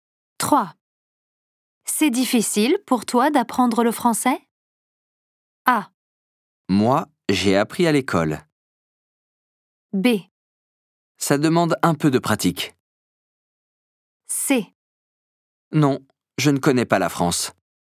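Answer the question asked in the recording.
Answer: B: Ça demande un peu de pratique.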